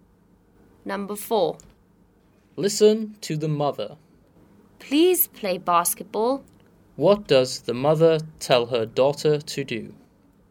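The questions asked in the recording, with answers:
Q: What does the mother tell her daughter to do?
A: Play basketball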